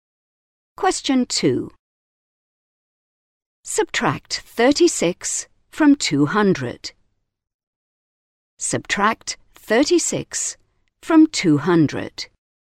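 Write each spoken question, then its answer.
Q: Subtract 36 from 200.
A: 164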